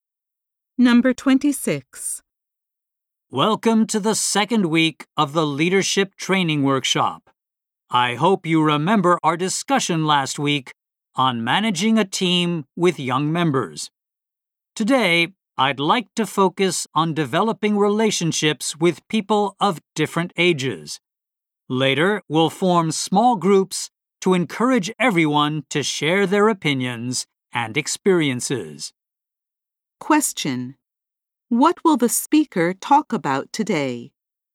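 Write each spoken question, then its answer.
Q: What will the speaker talk about today?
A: Developing relationships with people of different ages.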